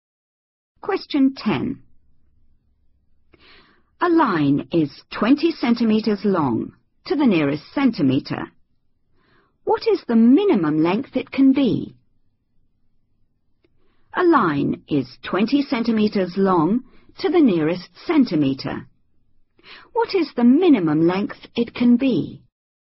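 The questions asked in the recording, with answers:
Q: What is the minimum length it can be?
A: 19.5 cm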